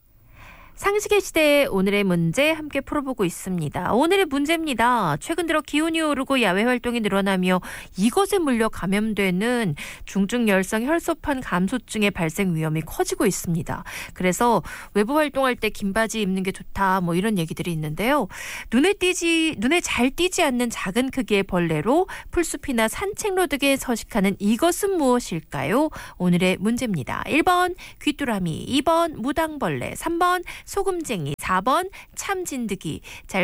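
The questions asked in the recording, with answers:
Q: 눈에 잘 띄지 않는 작은 크기의 벌레로 풀숲이나 산책로 등에 서식하는 이것은 무엇일까요?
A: 4번: 참진드기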